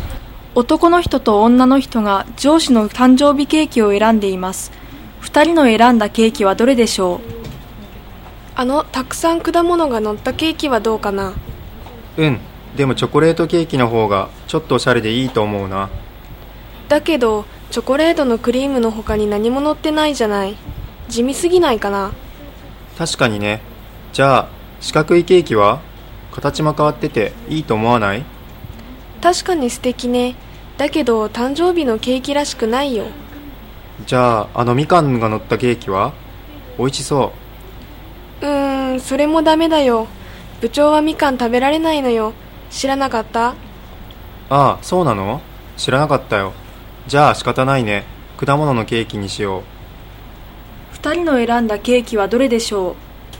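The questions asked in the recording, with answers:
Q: 二人の選んだケーキはどれでしょう?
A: たくさん果物が乗ったケーキ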